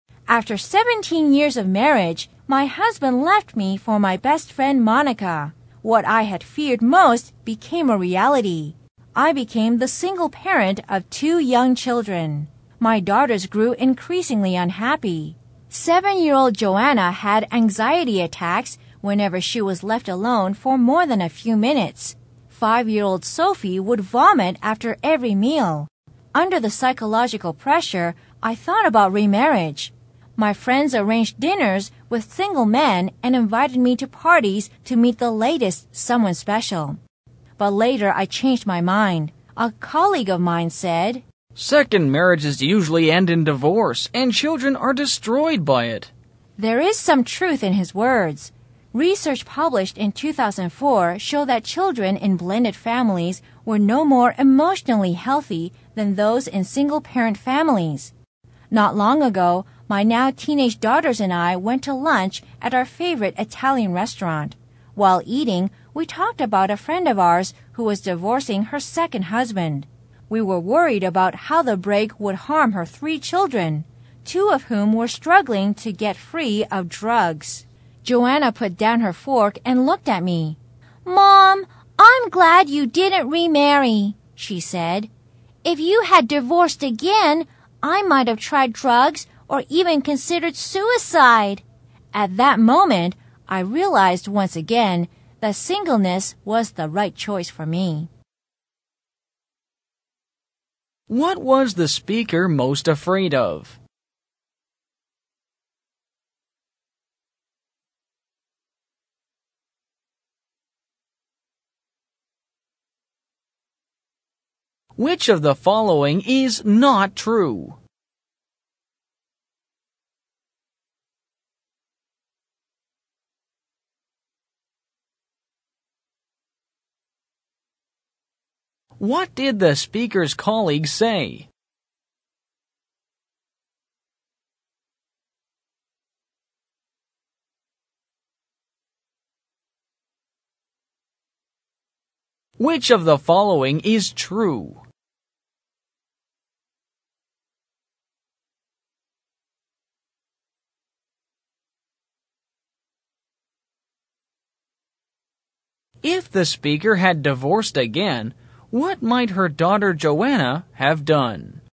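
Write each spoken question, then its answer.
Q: What was the speaker most afraid of?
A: Becoming the single parent of two young children

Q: What did the speaker's colleague say?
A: Second marriages usually end in divorce, and children are destroyed by it

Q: If the speaker had divorced again, what might her daughter Joanna have done?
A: Tried drugs or even considered suicide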